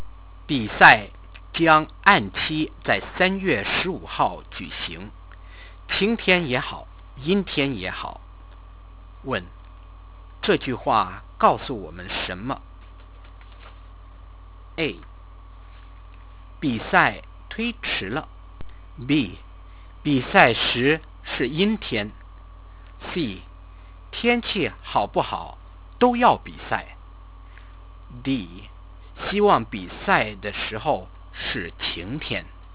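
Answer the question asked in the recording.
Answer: C: 天气好不好都要比赛。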